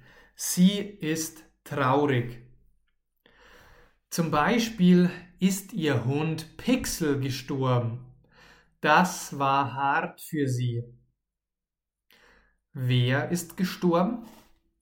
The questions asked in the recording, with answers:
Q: Wer ist gestorben?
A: Ihr Hund, ihr Hund Pixel ist gestorben.